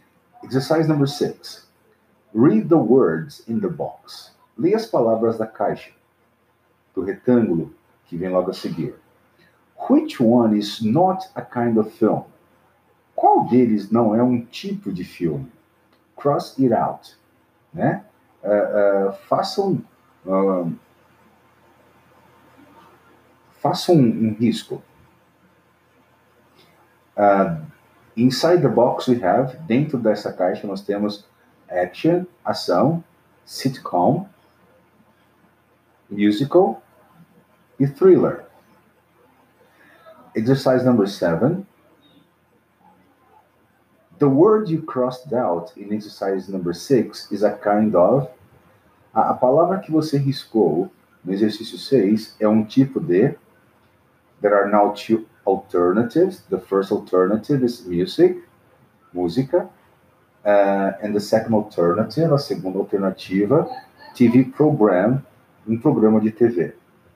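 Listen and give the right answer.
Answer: B: TV program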